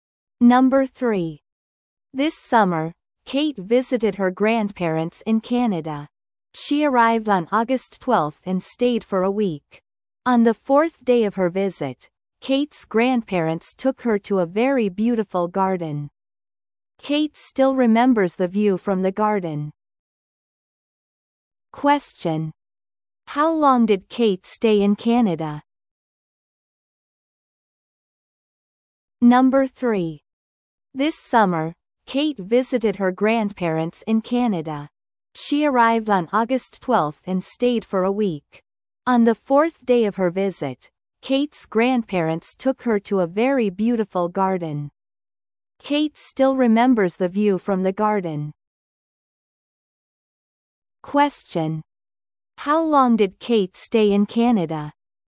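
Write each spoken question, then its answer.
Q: How long did Kate stay in Canada?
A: For a week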